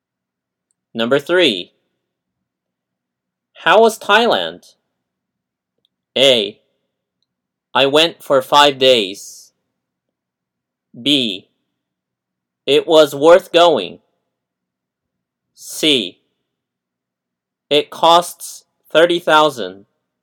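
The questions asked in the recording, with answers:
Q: How was Thailand?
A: B: It was worth going.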